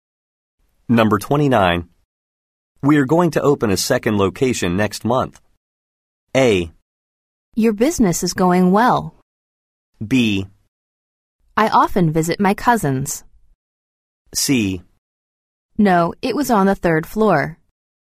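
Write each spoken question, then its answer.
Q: We are going to open a second location next month.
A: A: Your business is going well.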